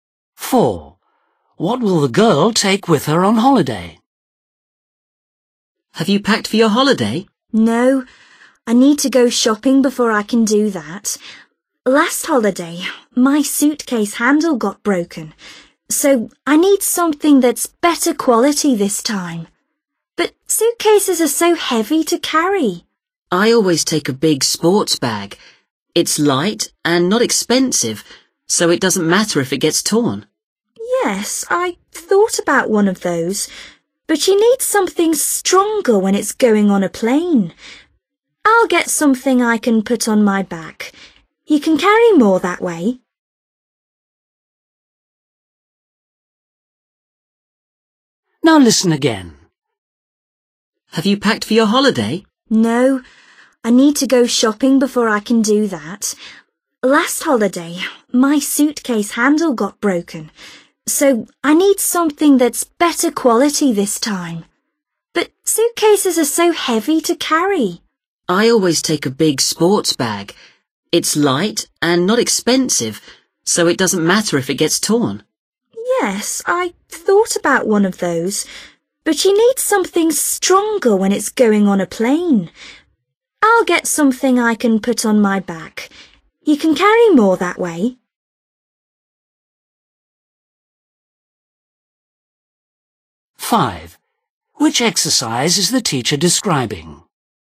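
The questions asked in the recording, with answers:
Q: What will the girl take with her on holiday?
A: a backpack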